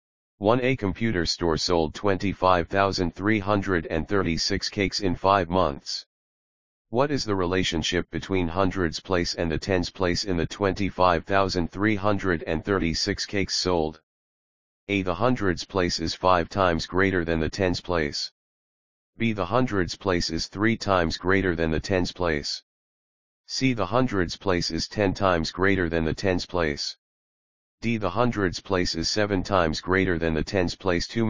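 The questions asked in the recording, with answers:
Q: What is the relationship between hundreds place and the tens place in the 25,336 cakes sold?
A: C: The hundreds place is 10 times greater than the tens place.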